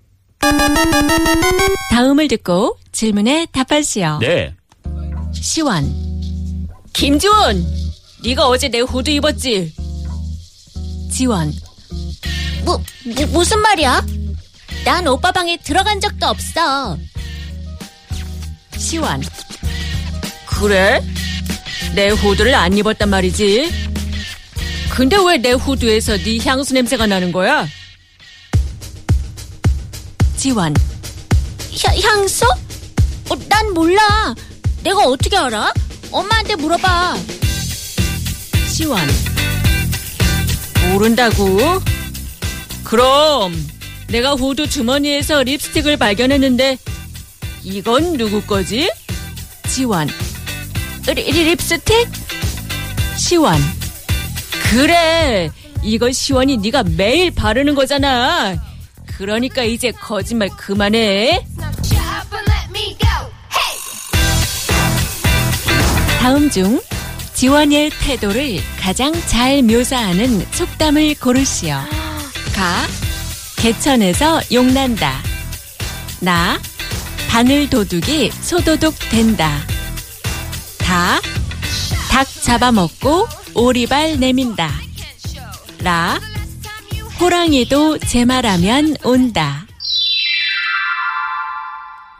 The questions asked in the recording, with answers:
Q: 다음 중 지원의 태도를 가장 잘 묘사하는 속담을 고르시오.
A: 다, 닭. 잡아먹고 오리발 내민다.